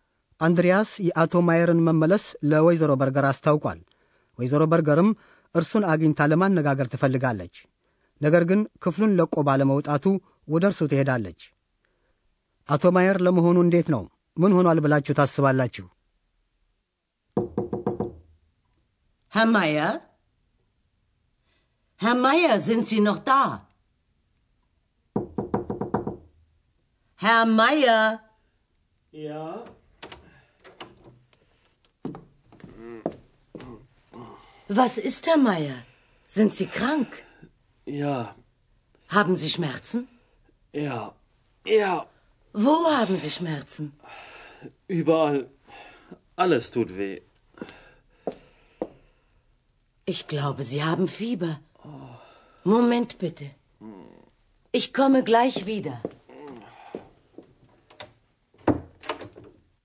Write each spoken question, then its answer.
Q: አቶ ማየር ለመሆኑ እንዴት ነው ምን ሆኗል ብላችሁ ታስባላችሁ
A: ከማቃሰቱ የተነሳ አቶ ማየር ደህና እንዳልሆነ ማለት መታመሙን ለመገንዘብ ምናልባት ብዙ አላዳግታችሁም።